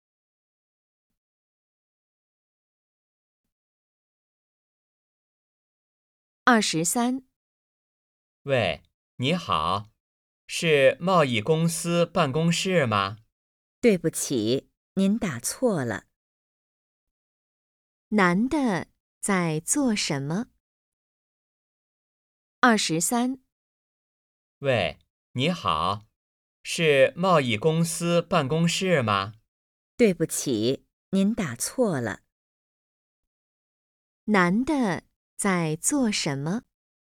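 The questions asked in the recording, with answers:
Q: 男的在做什么?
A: 打电话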